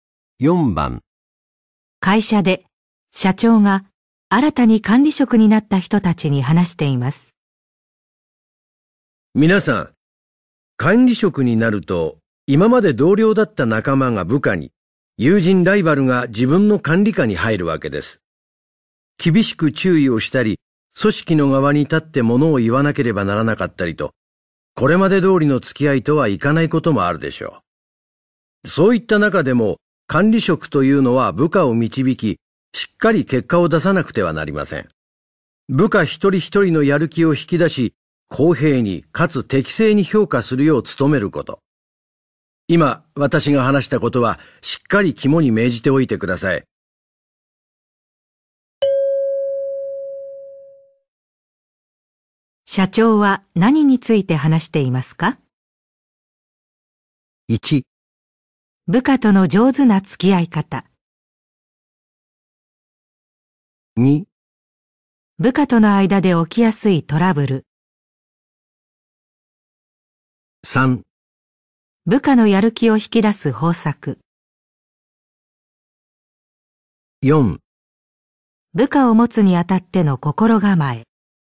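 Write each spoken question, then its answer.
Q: 社長は何について話していますか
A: 4: 部下を持つにあたっての心構え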